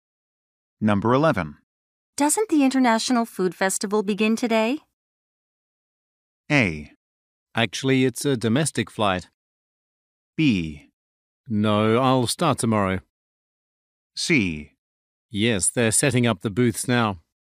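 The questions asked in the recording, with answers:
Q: Doesn't the International Food Festival begin today?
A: C: Yes, they're setting up the booths now.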